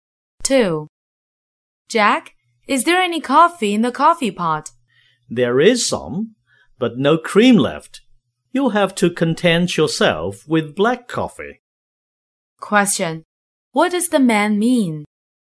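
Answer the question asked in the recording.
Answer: There is only black coffee; no cream is left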